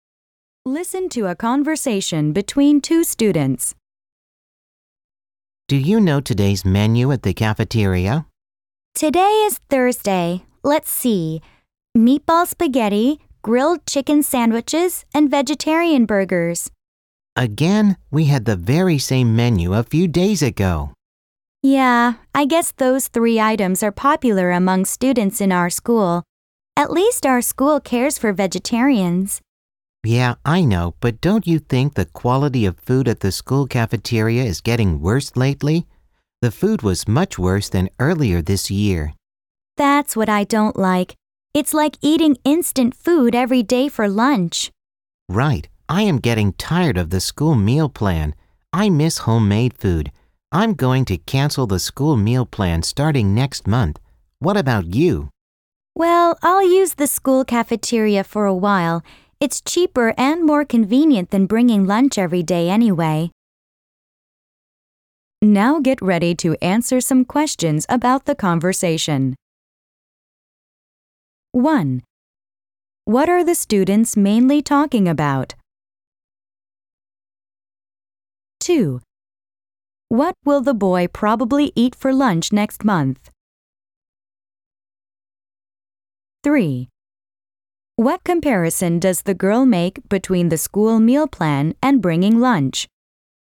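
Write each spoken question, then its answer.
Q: What are the students mainly talking about?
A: The school cafeteria food and meal plan

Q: What comparison does the girl make between the school meal plan and bringing lunch?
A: The school meal plan is cheaper and more convenient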